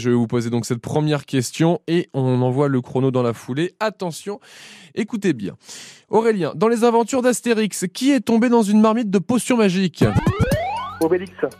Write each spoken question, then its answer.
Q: Aurélien, dans les aventures d'Astérix, qui est tombé dans une marmite de potions magiques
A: Obélix, oui, est une bonne réponse